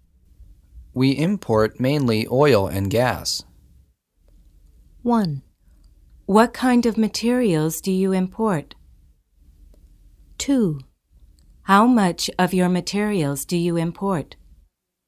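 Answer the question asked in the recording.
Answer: 1: What kind of materials do you import?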